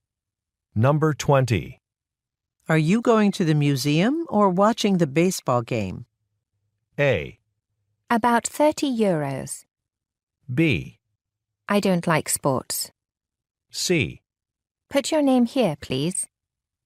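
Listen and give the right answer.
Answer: B: I don't like sports.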